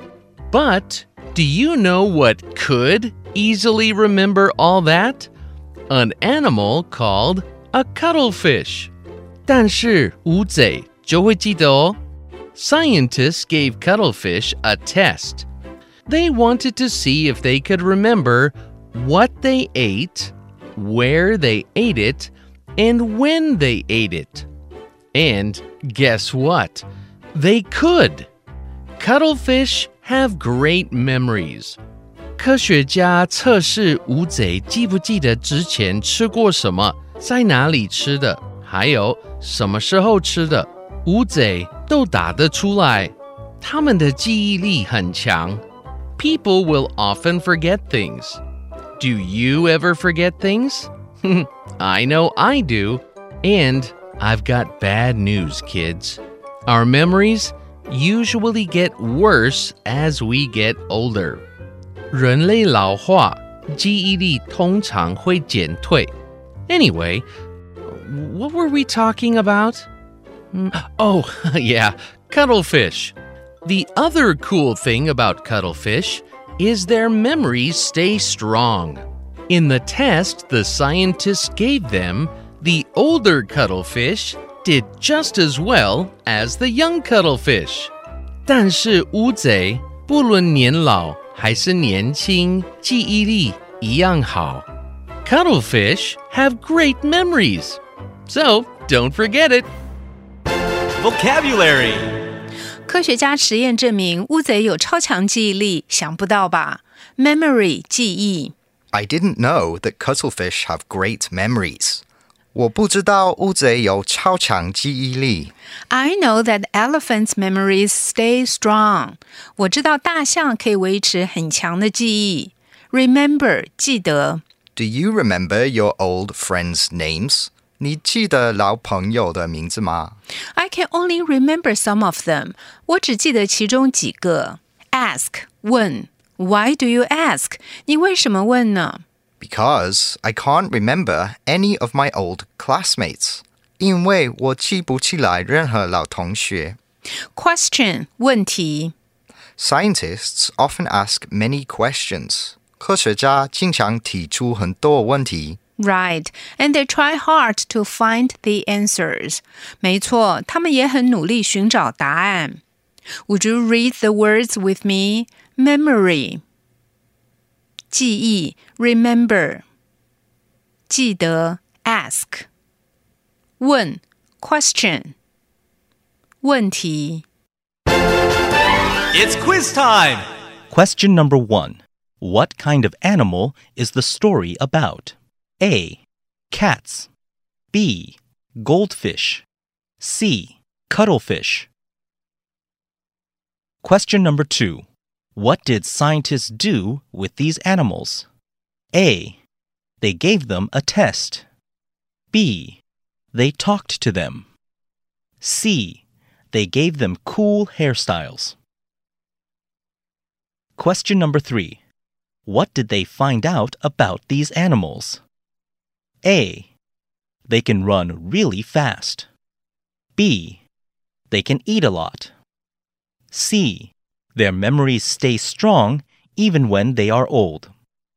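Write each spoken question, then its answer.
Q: What kind of animal is the story about?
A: C: Cuttlefish.

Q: What did scientists do with these animals?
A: A: They gave them a test.

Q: What did they find out about these animals?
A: C: Their memories stay strong even when they are old.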